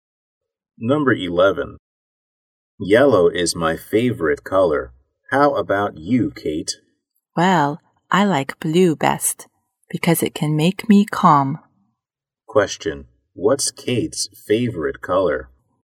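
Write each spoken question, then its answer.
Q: what's Kate's favorite color?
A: Blue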